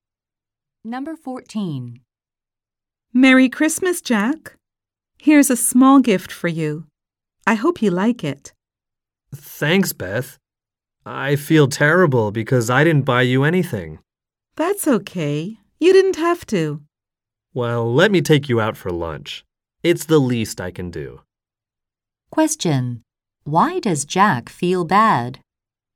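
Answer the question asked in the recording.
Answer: He didn't buy Beth a gift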